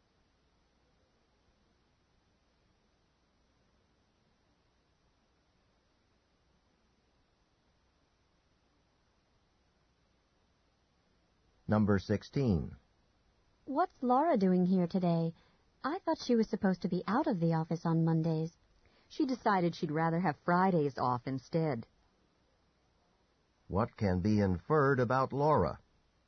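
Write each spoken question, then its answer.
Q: What can be inferred about Laura?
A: She changed her day off to Friday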